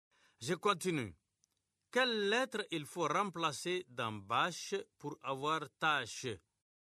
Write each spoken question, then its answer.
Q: Quelle lettre il faut remplacer dans bâche pour avoir tâche?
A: Monsieur, c'est la lettre B.